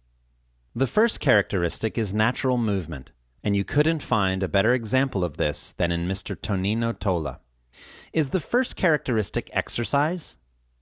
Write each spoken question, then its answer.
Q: Is the first characteristic exercise?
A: Well, not exactly. The first characteristic is natural movement.